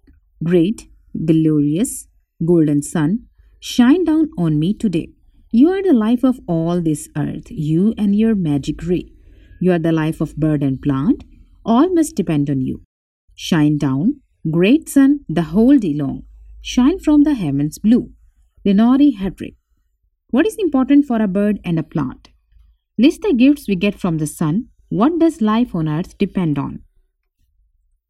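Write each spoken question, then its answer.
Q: What is important for a bird and a plant?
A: The sun

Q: What does life on earth depend on?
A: The sun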